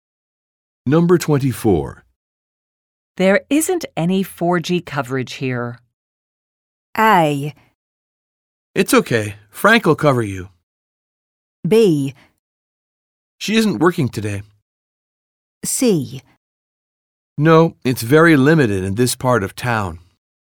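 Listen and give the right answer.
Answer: C: No, it's very limited in this part of town.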